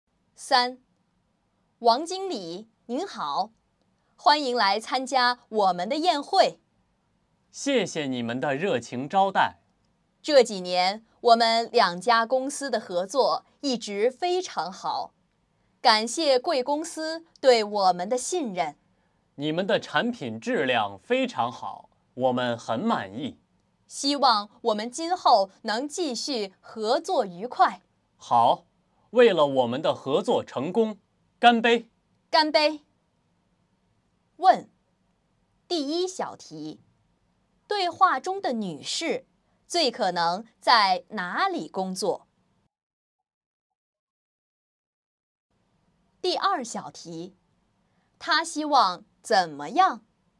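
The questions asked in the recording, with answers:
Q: 她希望怎么样?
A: 今后继续合作愉快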